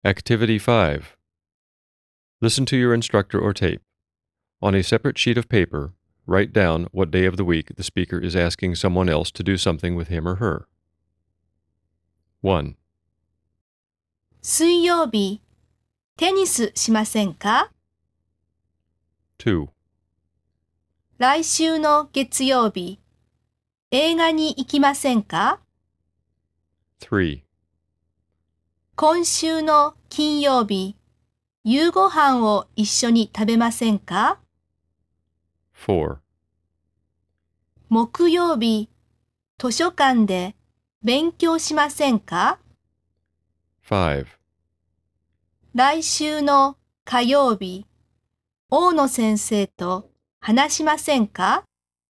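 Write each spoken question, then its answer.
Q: 水曜日、テニスしませんか?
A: 水曜日 (Wednesday)

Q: 来週の月曜日、映画に行きませんか?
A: 来週の月曜日 (Monday)

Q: 今週の金曜日、夕ご飯を一緒に食べませんか?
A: 今週の金曜日 (Friday)

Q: 木曜日、図書館で勉強しませんか?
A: 木曜日 (Thursday)

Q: 来週の火曜日、大野先生と話しませんか?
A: 来週の火曜日 (Tuesday)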